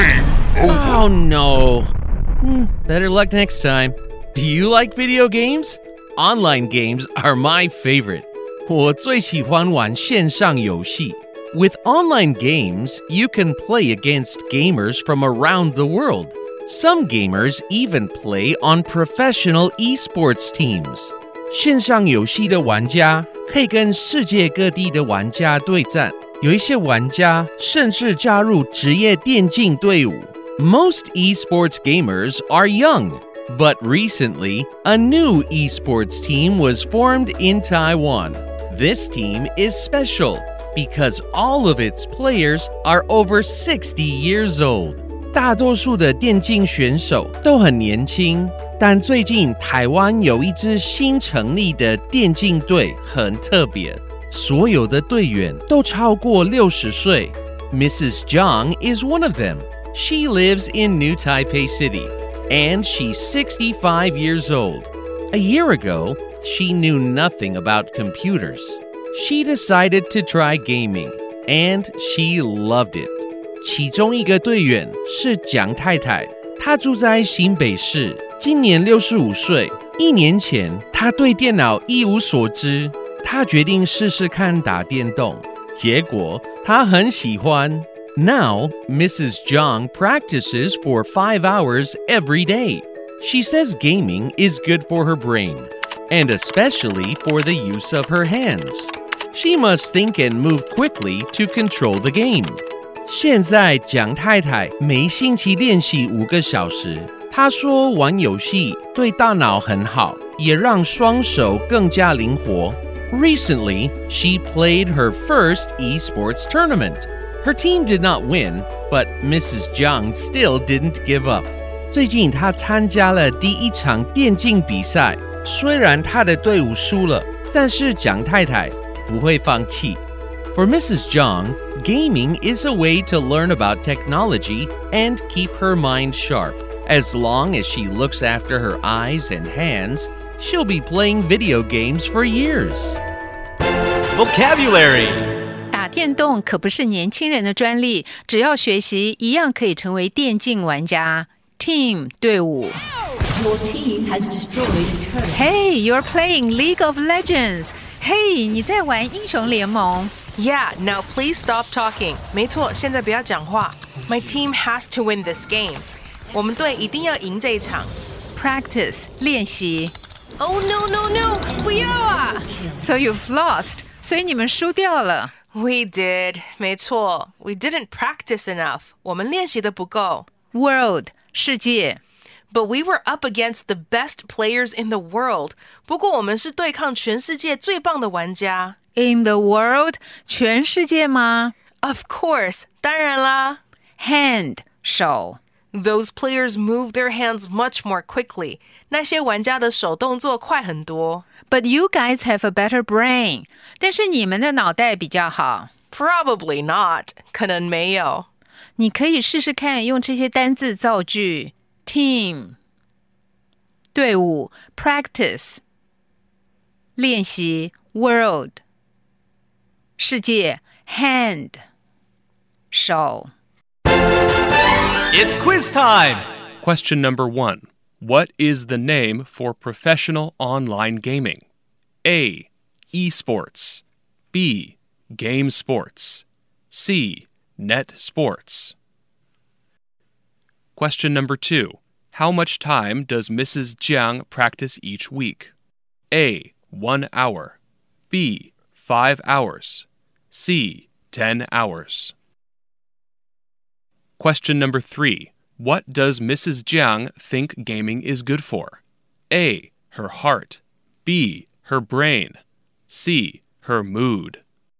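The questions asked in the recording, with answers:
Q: What is the name for professional online gaming?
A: A: Esports

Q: What does Mrs. Jiang think gaming is good for?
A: B: Her brain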